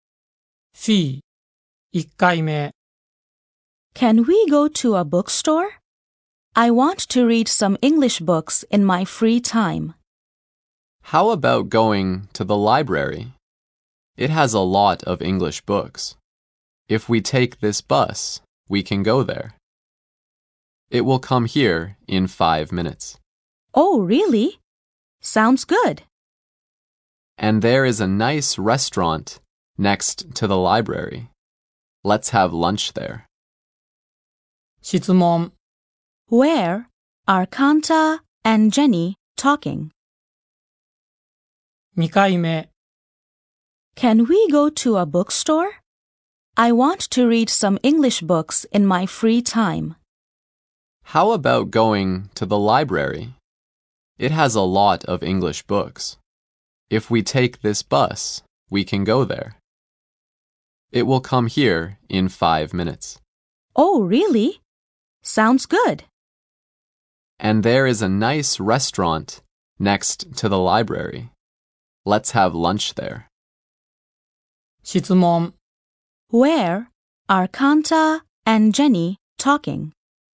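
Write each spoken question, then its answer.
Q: Where are Kanta and Jenny talking?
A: At a bus stop.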